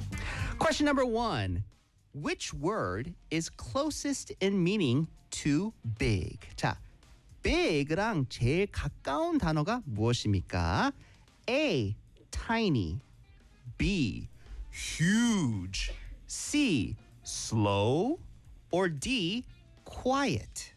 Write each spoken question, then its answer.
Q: Which word is closest in meaning to big?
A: B, huge.